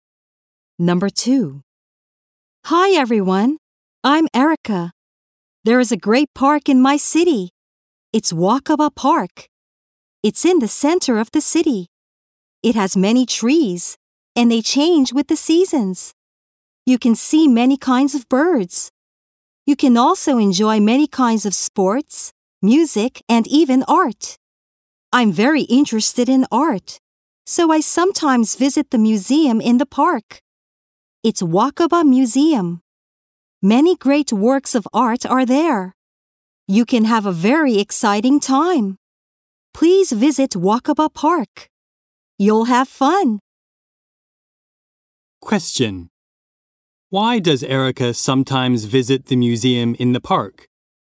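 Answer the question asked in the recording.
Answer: Because she is very interested in art.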